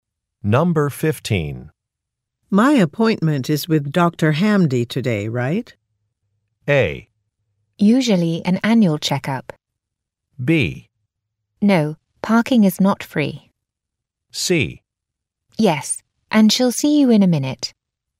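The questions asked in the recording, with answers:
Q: My appointment is with Dr. Hamdi today, right?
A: C: Yes, and she'll see you in a minute.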